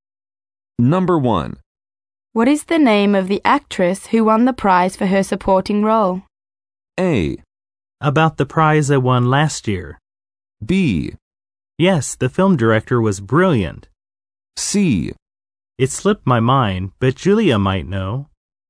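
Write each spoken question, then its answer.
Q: What is the name of the actress who won the prize for her supporting role?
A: C: It slipped my mind, but Julia might know.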